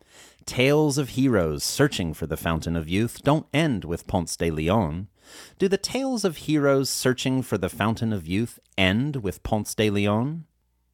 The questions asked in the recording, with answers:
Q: Do the tales of heroes searching for the Fountain of Youth end with Ponce de Leon?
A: No, tales of heroes searching for the Fountain of Youth don't end with Ponce de Leon.